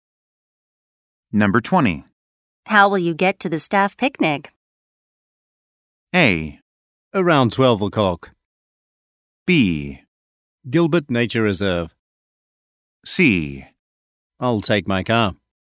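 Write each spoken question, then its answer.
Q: How will you get to the staff picnic?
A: C: I'll take my car.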